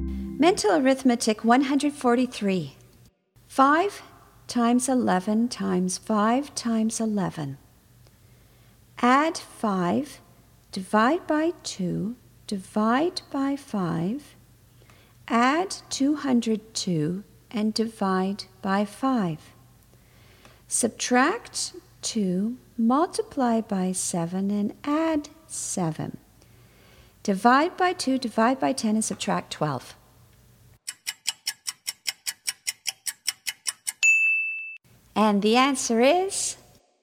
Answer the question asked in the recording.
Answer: 23.